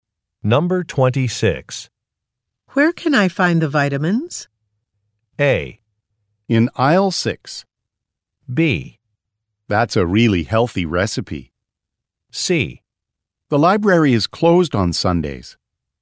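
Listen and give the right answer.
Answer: A: In aisle 6.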